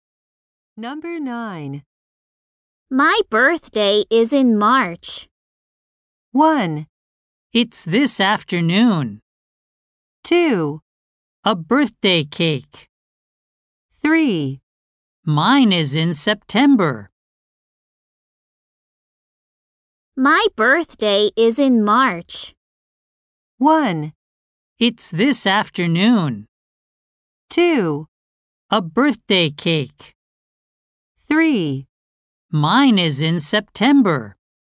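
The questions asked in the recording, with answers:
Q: My birthday is in March.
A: 3: Mine is in September.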